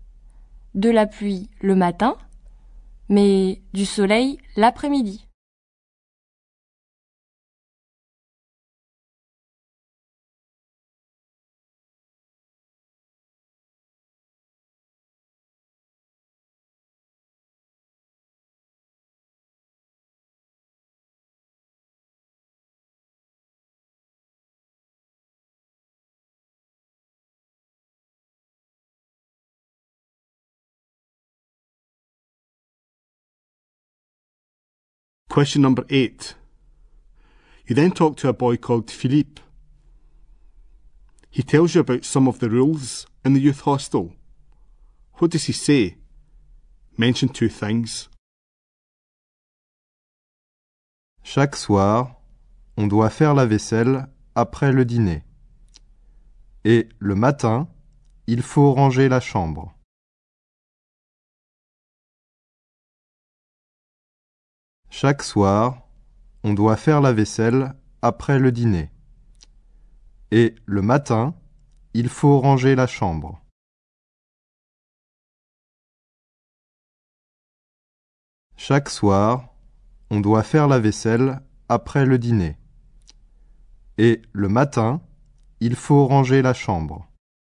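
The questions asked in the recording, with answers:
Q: What does he say? Mention two things.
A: Do the washing up after dinner every evening; tidy the room in the morning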